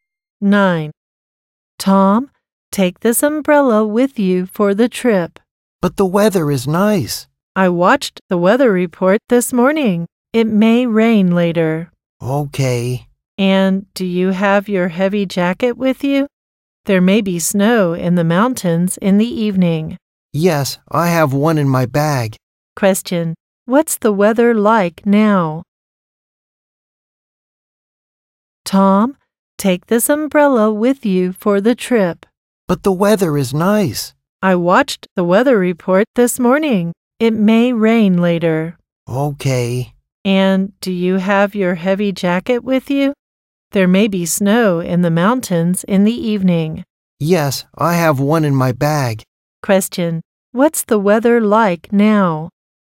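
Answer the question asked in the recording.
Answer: It's nice.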